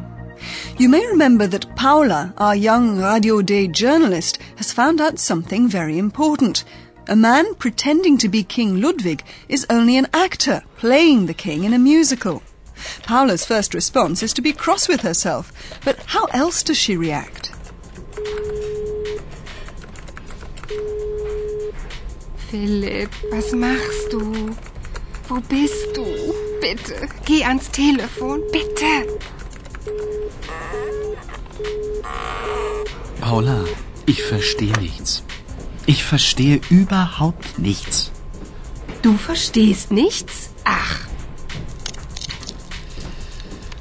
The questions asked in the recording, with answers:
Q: Paula's first response is to be cross with herself, but how else does she react?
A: Paula's first reaction is to try and phone Philipp.